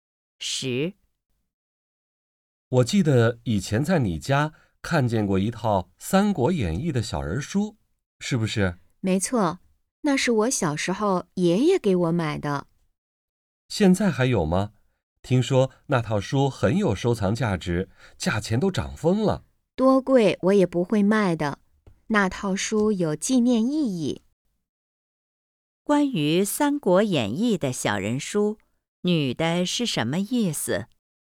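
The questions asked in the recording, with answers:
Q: 关于《三国演义》的小人书,女的是什么意思?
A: 多贵也不会卖,因为有纪念意义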